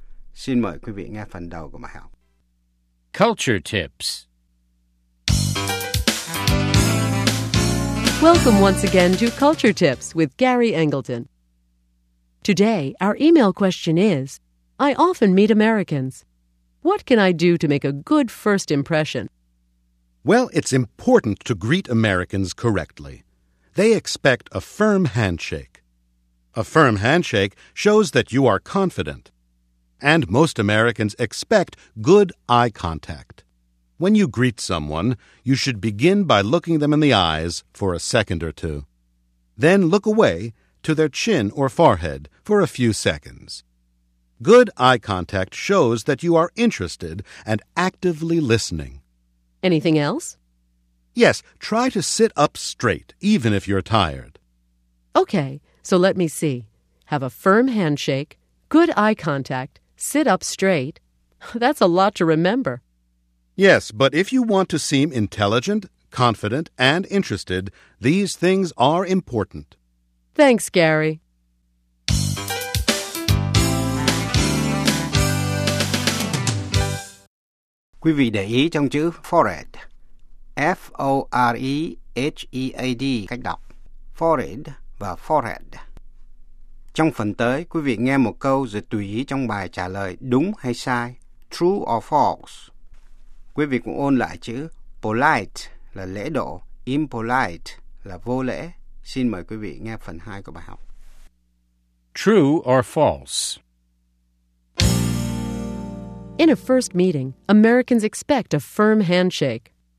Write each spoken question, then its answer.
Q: In a first meeting, Americans expect a firm handshake.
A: True. A firm handshake shows that you are confident.